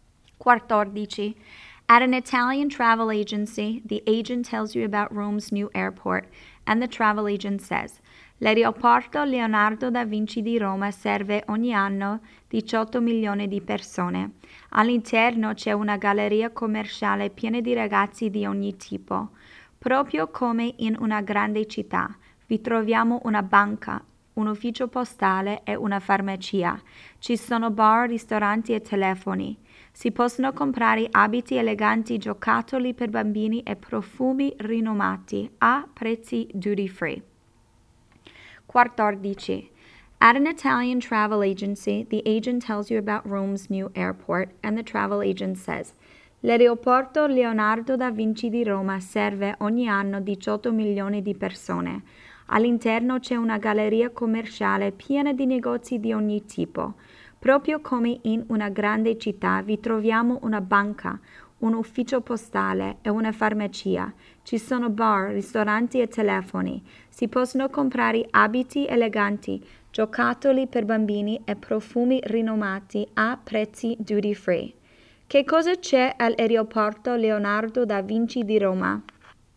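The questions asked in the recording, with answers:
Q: Che cosa c'è all'aeroporto Leonardo da Vinci di Roma?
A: Una galleria commerciale con negozi, banca, ufficio postale, farmacia, bar e ristoranti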